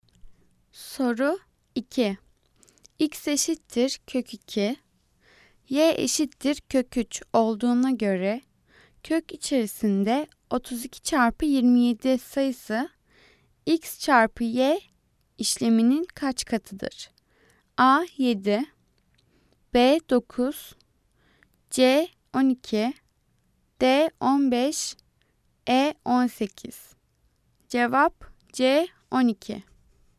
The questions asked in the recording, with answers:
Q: X eşittir kök 2, y eşittir kök 3 olduğuna göre kök içerisinde 32 çarpı 27 sayısı x çarpı y işleminin kaç katıdır?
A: Cevap C 12.